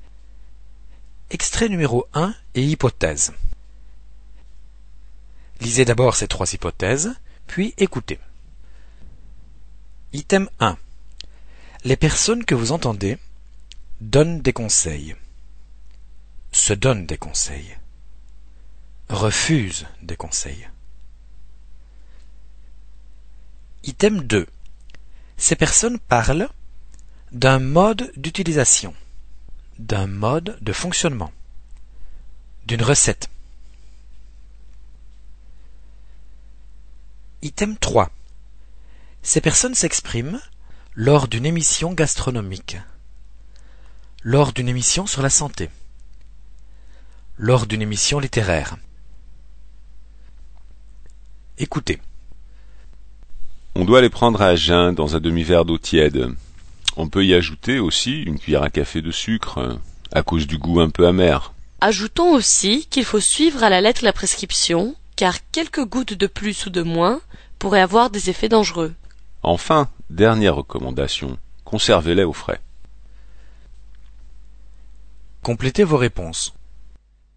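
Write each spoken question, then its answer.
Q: Les personnes que vous entendez donnent des conseils. Se donnent des conseils. Refusent des conseils.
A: A: donnent des conseils

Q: Ces personnes parlent d'un mode d'utilisation, d'un mode de fonctionnement, d'une recette.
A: A: d'un mode d'utilisation

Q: Ces personnes s'expriment lors d'une émission gastronomique, lors d'une émission sur la santé, lors d'une émission littéraire.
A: B: lors d'une émission sur la santé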